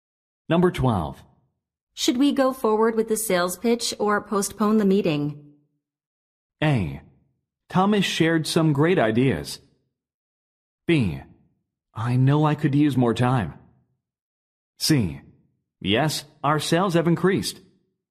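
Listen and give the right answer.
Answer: B: I know I could use more time.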